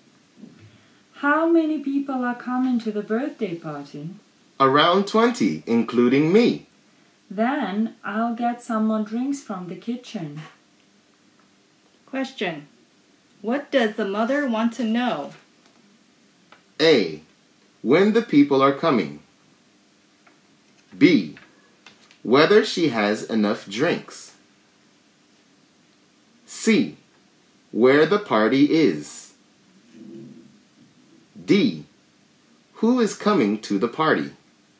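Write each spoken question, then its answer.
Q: Question. What does the mother want to know?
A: B: Whether she has enough drinks.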